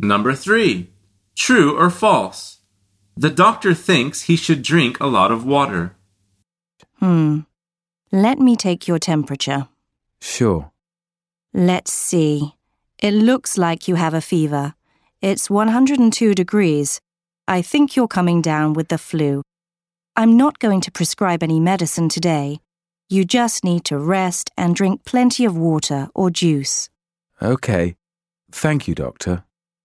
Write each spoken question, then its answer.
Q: True or false? The doctor thinks he should drink a lot of water.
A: The answer is true.